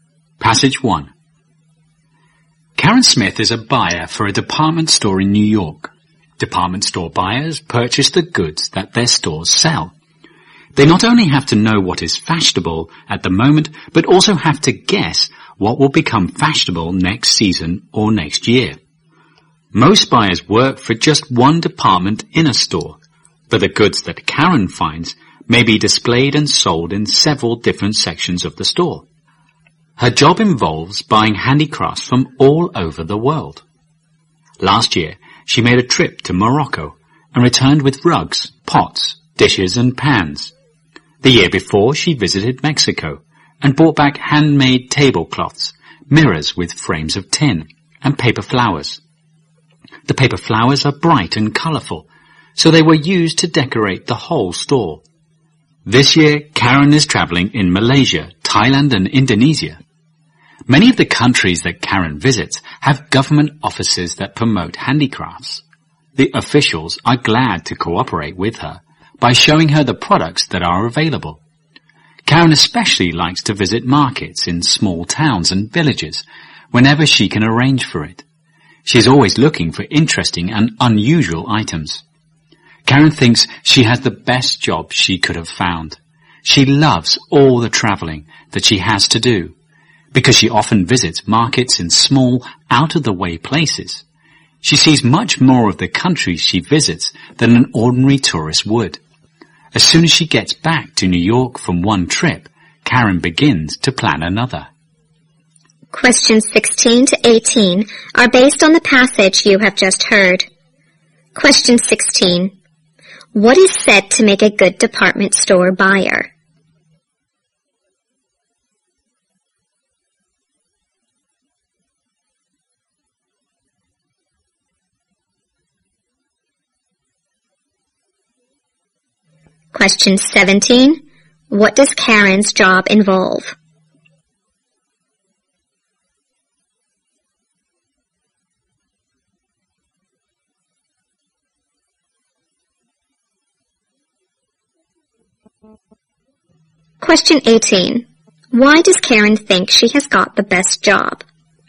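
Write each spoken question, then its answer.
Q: What is said to make a good department store buyer?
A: Knowing what is fashionable now and guessing what will become fashionable

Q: What does Karen's job involve?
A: Buying handicrafts from all over the world

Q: Why does Karen think she has got the best job?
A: She loves traveling and sees much more of the countries than an ordinary tourist would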